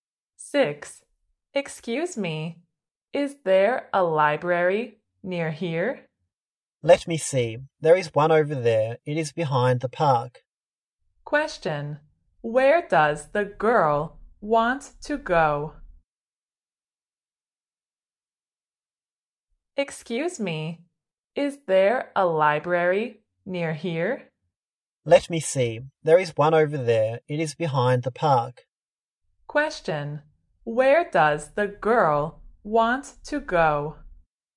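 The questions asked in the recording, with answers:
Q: Question. Where does the girl want to go?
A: The library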